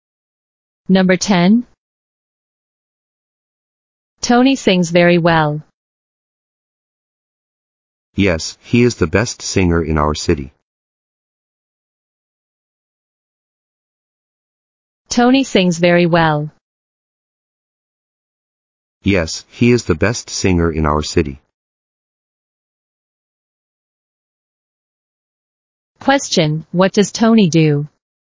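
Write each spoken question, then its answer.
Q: Question, what does Tony do?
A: He is a singer.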